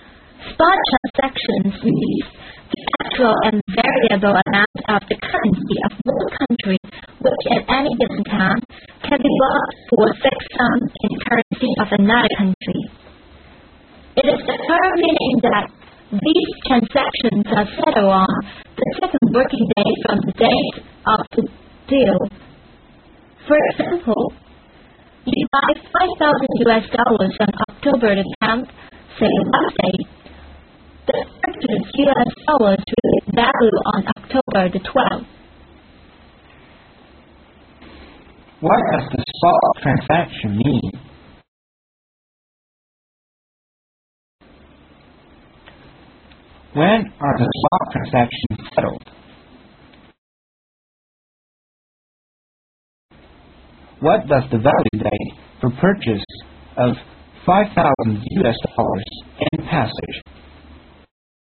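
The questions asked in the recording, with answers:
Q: What does the spot transaction mean?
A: The actual, variable amount of one country's currency that can be bought at any given time for a fixed sum in another country's currency

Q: When are the spot transactions settled?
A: On the second working day from the date of the deal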